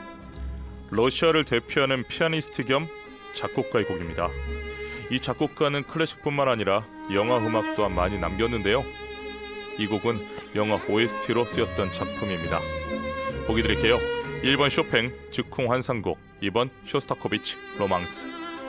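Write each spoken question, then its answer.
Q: 이 곡은 영화 OST로 쓰였던 작품입니다. 보기 드릴게요. 1번 쇼팽 즉흥 환상곡, 2번 쇼스타코비치 로망스.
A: 2: 쇼스타코비치 로망스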